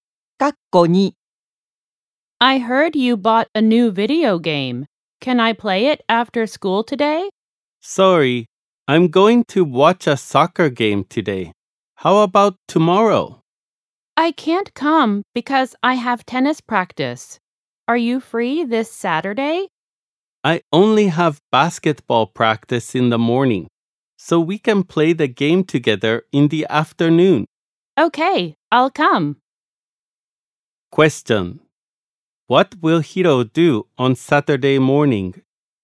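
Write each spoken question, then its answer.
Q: What will Hiro do on Saturday morning?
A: Basketball practice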